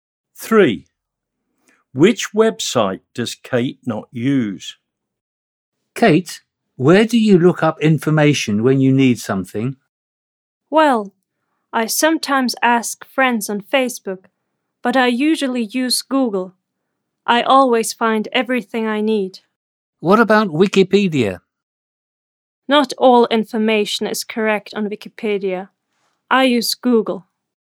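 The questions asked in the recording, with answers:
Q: Which website does Kate not use?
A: Wikipedia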